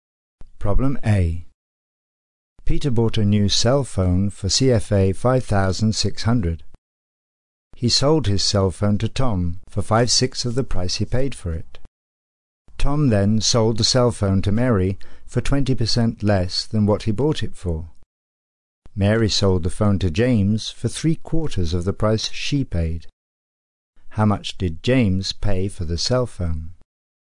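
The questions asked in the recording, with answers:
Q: How much did James pay for the cell phone?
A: CFA 2,800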